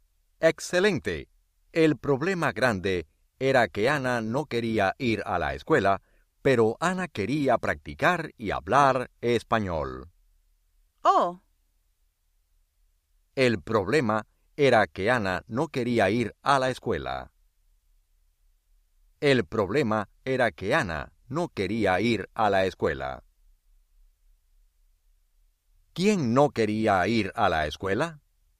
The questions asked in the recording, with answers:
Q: ¿Quién no quería ir a la escuela?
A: Ana.